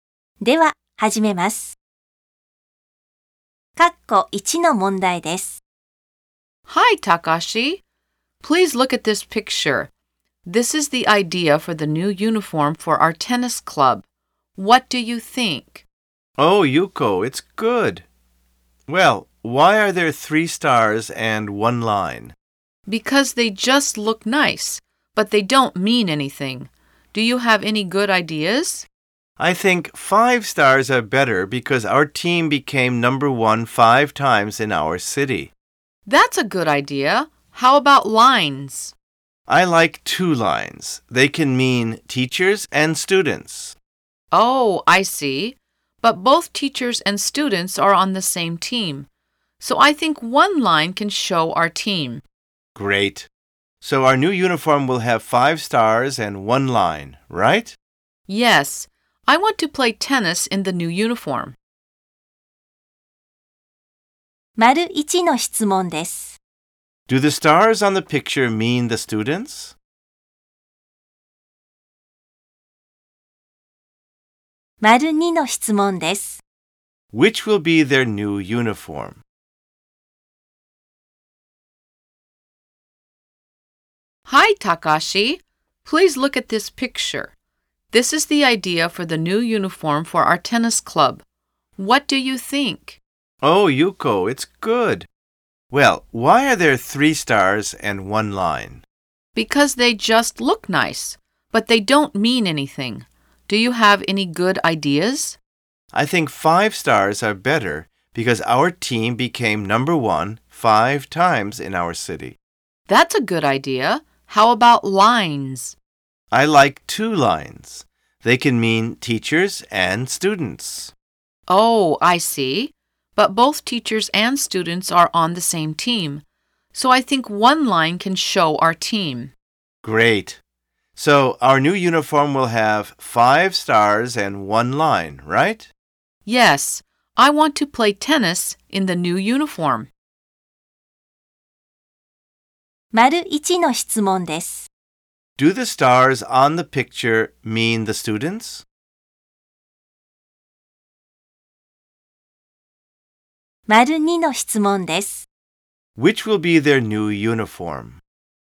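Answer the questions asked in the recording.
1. No, they don't.
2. The one with 5 stars and 1 line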